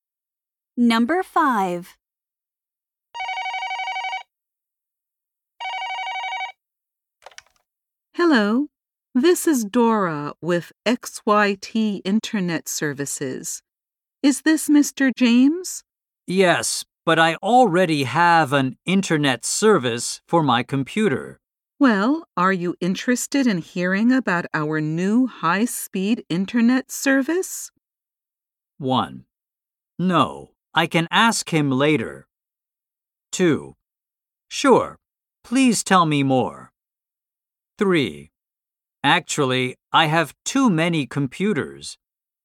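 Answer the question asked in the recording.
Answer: 2: Sure, please tell me more.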